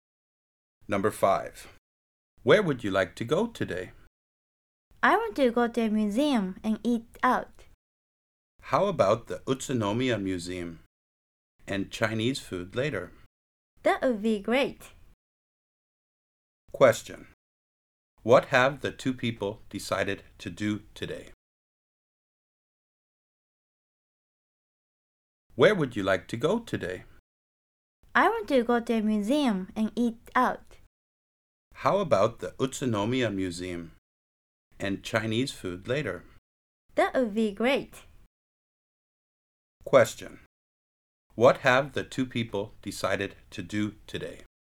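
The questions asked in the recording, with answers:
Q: What have the two people decided to do today?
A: Go to the Utsunomiya Museum and eat Chinese food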